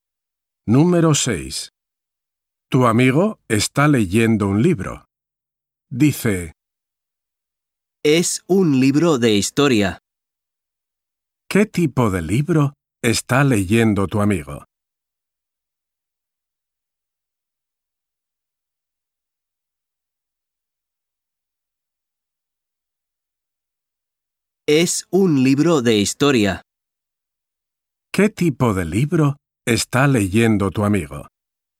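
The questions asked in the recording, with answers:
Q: ¿Qué tipo de libro está leyendo tu amigo?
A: Un libro de historia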